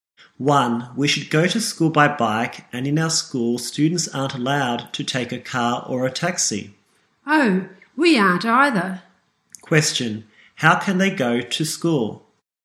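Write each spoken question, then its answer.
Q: How can they go to school?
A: By bike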